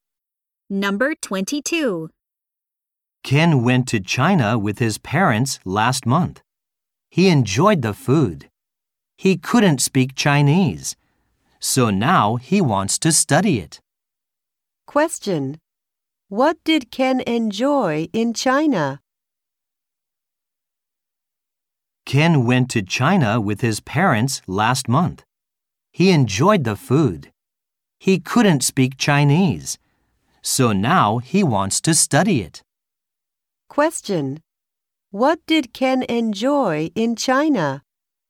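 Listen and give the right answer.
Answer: The food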